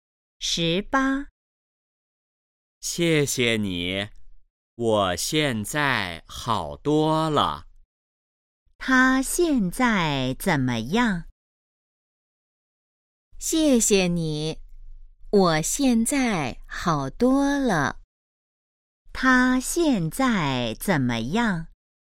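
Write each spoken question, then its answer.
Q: 他现在怎么样?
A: 好多了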